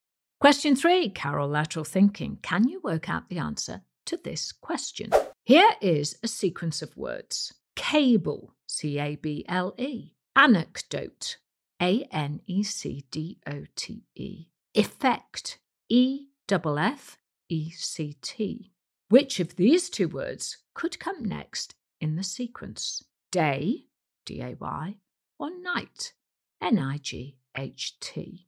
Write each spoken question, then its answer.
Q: Which of these two words could come next in the sequence?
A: Well, the answer is night could come next in the sequence, N I G H T.